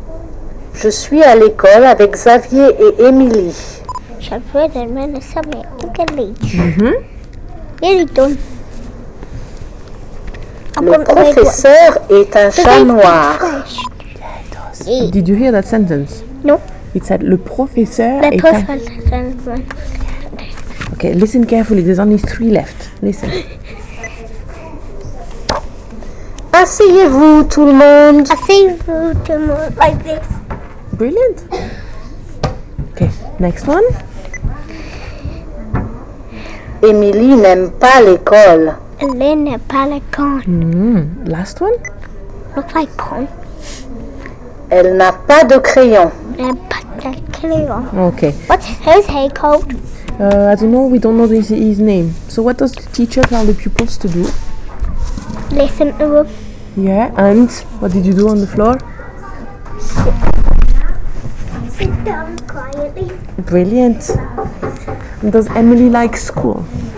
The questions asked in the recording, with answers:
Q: And does Emily like school?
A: No. Well done.